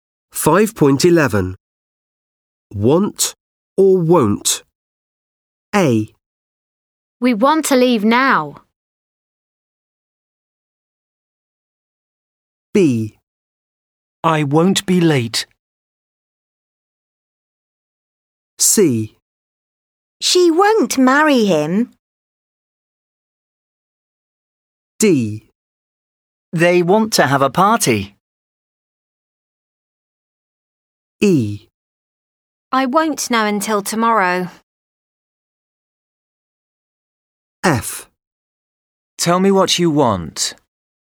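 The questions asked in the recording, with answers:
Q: Want or won't?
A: want

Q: Want or won't?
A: won't

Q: Want or won't?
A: won't

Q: Want or won't?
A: want

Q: Want or won't?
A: won't

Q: Want or won't?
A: want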